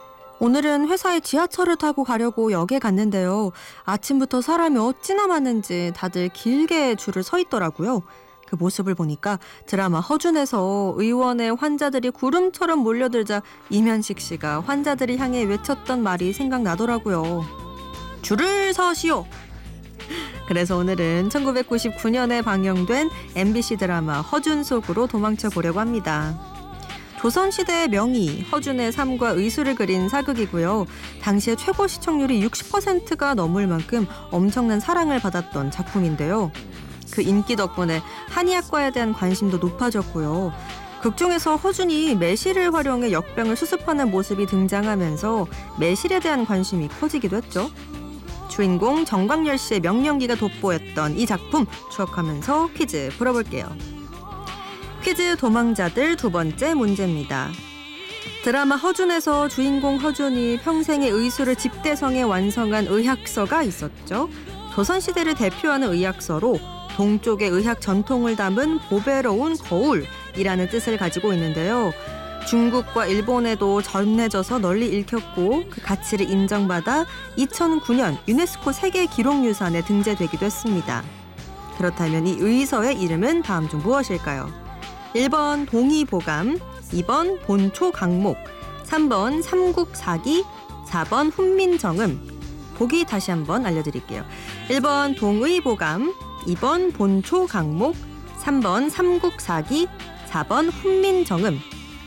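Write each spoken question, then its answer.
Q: 그렇다면 이 의서의 이름은 다음 중 무엇일까요?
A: 1: 동의보감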